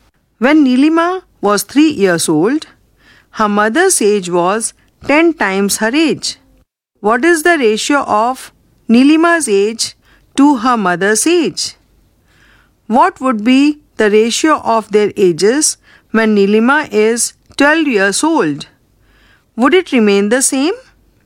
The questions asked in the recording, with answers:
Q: What is the ratio of Neelima's age to her mother's age?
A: In the simplest form, it is 1:10.

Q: What would be the ratio of their ages when Neelima is 12 years old?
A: In the simplest form, it is 4:13.